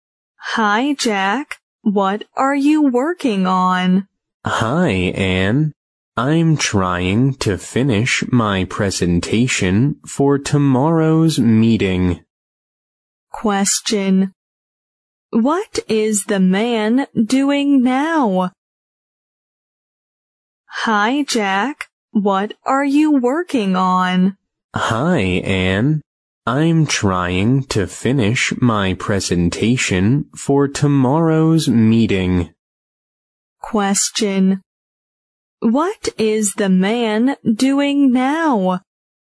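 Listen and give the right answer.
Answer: Finishing his presentation for tomorrow's meeting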